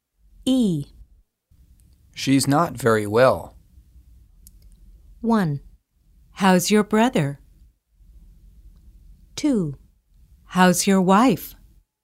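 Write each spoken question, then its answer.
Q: She's not very well.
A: 2: How's your wife?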